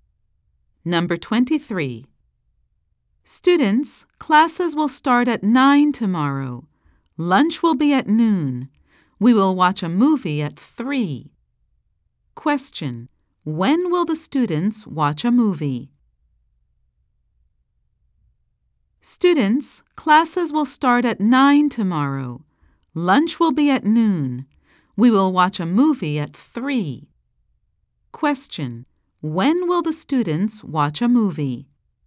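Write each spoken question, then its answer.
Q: When will the students watch a movie?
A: At 3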